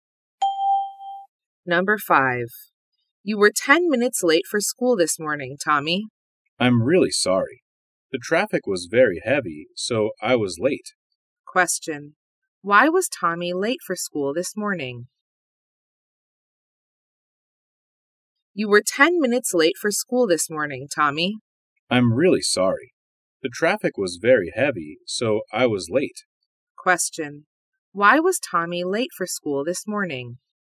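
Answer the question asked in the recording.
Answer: The traffic was very heavy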